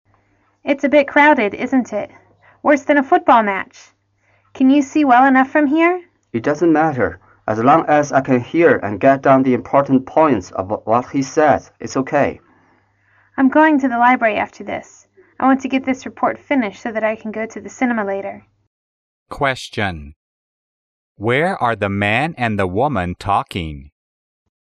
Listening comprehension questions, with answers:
Where are the man and the woman talking?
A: In the lecture room.

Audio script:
W: It's a bit crowded isn't it...worse than a football match! Can you see well enough from here?
M: It doesn't matter. As long as I can hear and get down the important points of what he says, it's OK.
W: I'm going to the library after this. I want to get this report finished so that I can go to the cinema later.